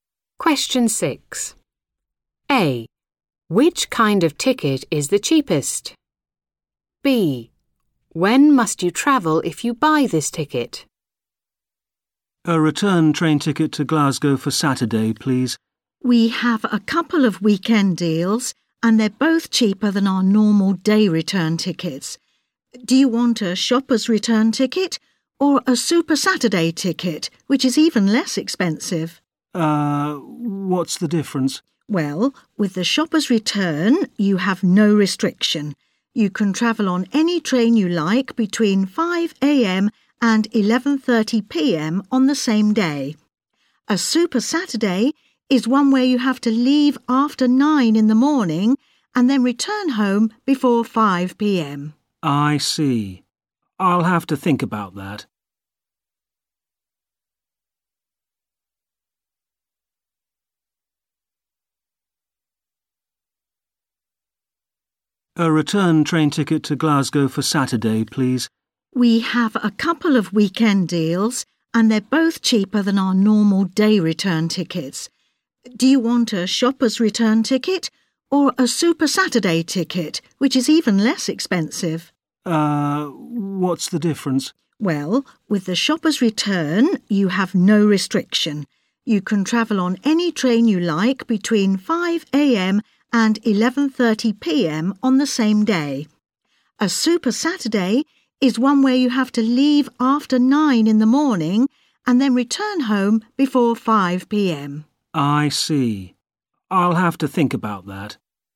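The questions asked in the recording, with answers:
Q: Which kind of ticket is the cheapest?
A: Super Saturday ticket

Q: When must you travel if you buy this ticket?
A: Leave after 9 a.m. and return before 5 p.m.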